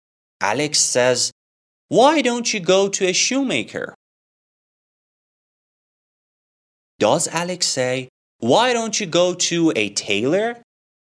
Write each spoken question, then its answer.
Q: Does Alex say, "Why don't you go to a tailor?"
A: No. Alex says, "Why don't you go to a shoemaker?"